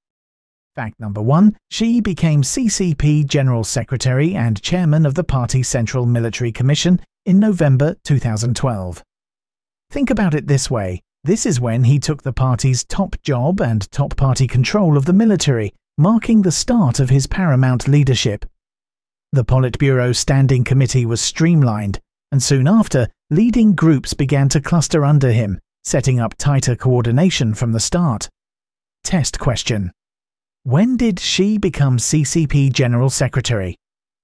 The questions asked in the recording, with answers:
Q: When did Xi become CCP General Secretary?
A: Correct answer, November 2012.